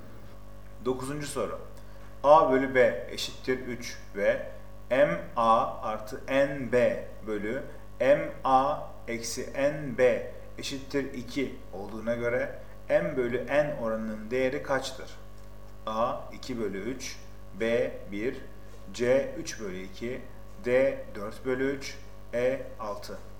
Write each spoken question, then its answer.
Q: A bölü B eşittir 3 ve M A artı N B bölü M A eksi N B eşittir 2 olduğuna göre M bölü N oranının değeri kaçtır?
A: Doğru cevap B 1.